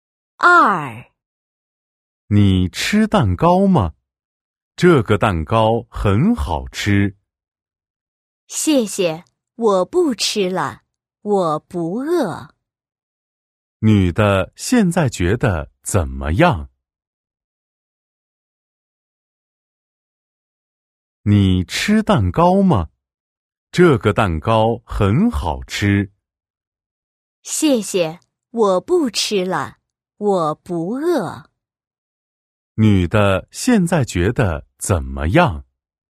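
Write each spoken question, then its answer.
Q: 女的现在觉得怎么样?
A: 不饿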